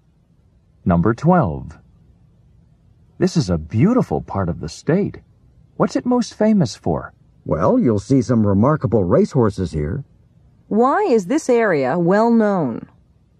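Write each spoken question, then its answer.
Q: Why is this area well known?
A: For its racehorses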